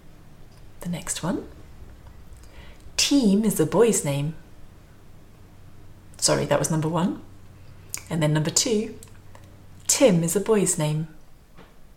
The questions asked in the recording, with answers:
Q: Team is a boy's name. Sorry, that was number one. And then number two. Tim is a boy's name.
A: Again, the answer is number two.